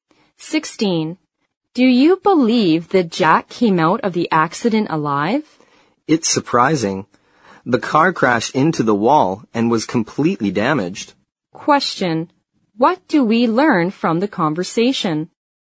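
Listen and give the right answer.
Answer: Jack survived a bad car accident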